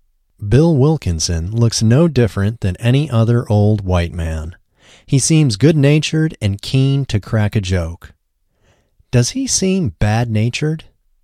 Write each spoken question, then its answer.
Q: Does he seem bad-natured?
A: No, he doesn't seem bad-natured.